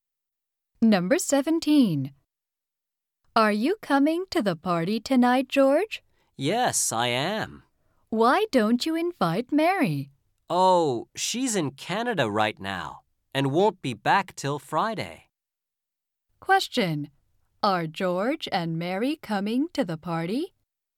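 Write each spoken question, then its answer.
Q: Are George and Mary coming to the party?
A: George is coming, but Mary isn't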